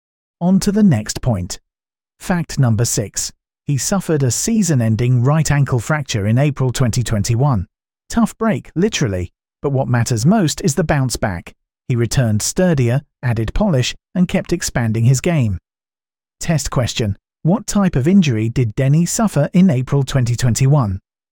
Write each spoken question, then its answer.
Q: What type of injury did Denny suffer in April 2021?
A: Correct answer. Right ankle fracture.